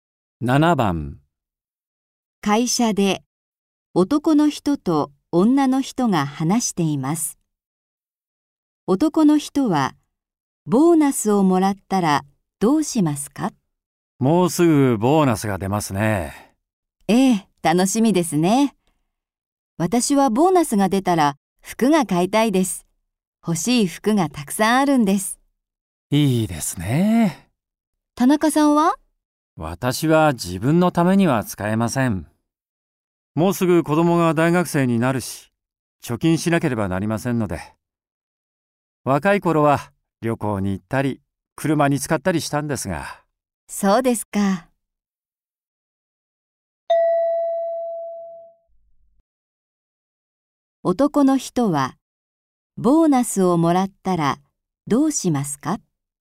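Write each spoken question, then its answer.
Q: 男の人はボーナスをもらったらどうしますか?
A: 貯金する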